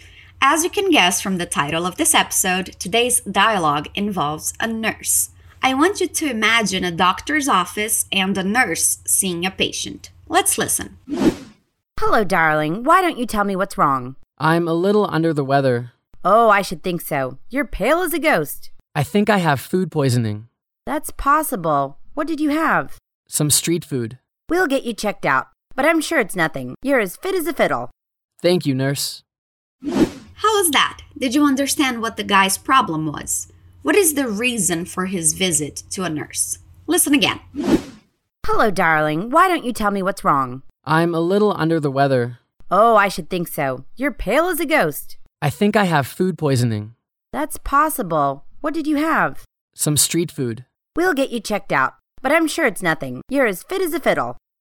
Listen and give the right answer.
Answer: The guy seems to have food poisoning, which is never fun